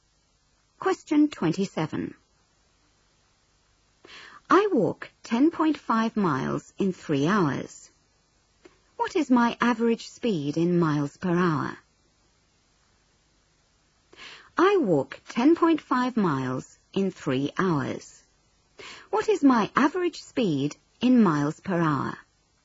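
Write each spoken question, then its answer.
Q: What is my average speed in miles per hour?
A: 3.5 mph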